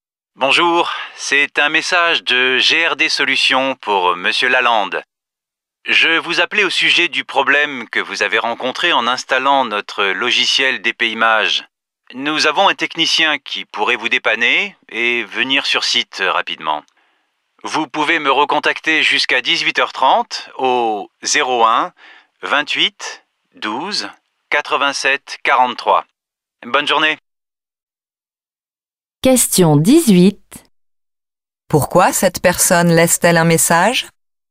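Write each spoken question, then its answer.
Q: Pourquoi cette personne laisse-t-elle un message?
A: Pour proposer l'intervention d'un technicien afin de résoudre le problème d'installation du logiciel DPImage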